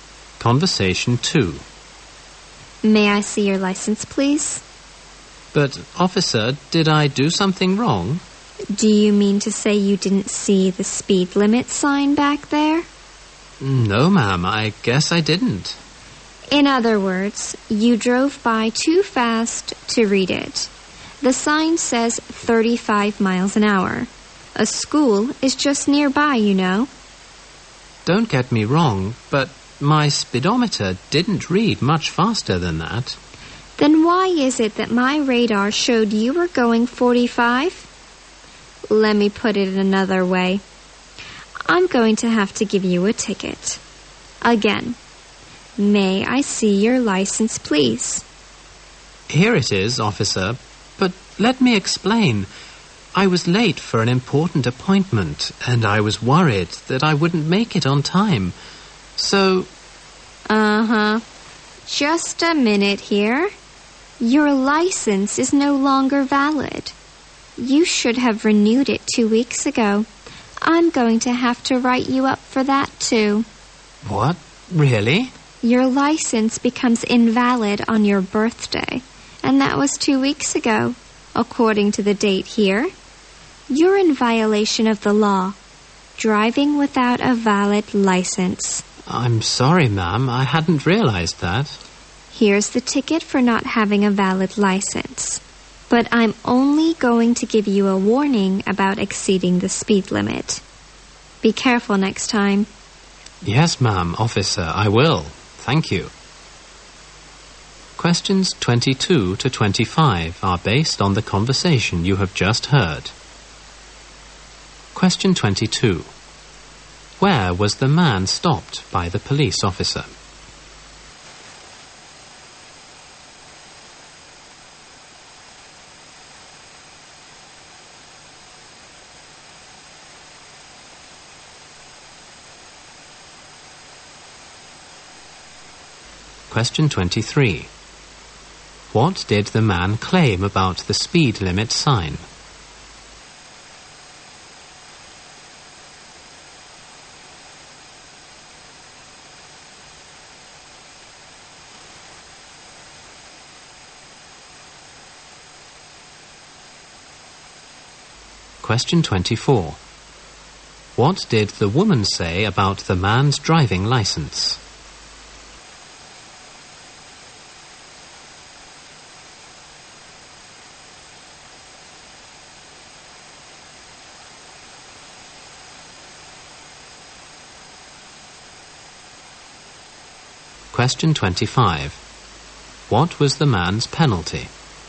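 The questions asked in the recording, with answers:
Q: Where was the man stopped by the police officer?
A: Near a school

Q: What did the man claim about the speed limit sign?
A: He didn't see it

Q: What did the woman say about the man's driving license?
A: It had expired two weeks ago and was no longer valid

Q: What was the man's penalty?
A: A ticket for driving without a valid license and a warning for speeding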